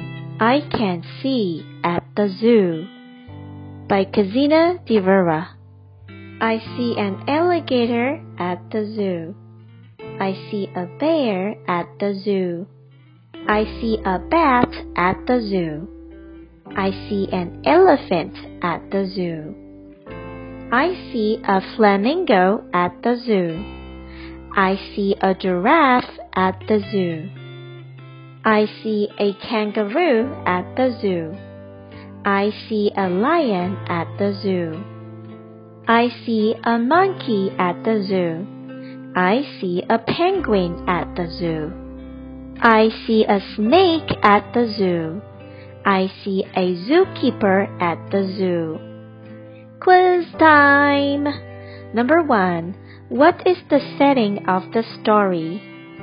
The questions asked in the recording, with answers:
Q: What is the setting of the story?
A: That's right. The answer is zoo.